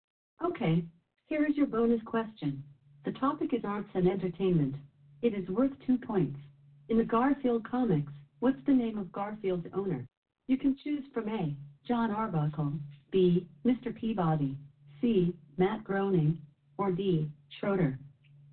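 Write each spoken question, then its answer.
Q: In the Garfield comics, what's the name of Garfield's owner?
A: A: John Arbuckle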